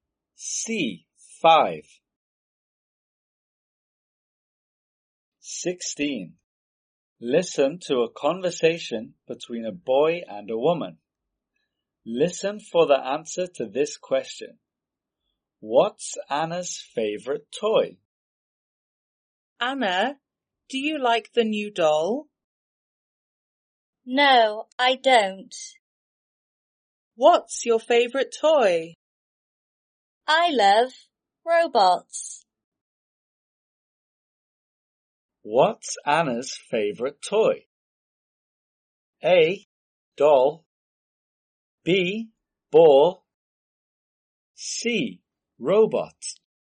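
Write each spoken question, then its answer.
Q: What's Anna's favorite toy?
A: C: Robot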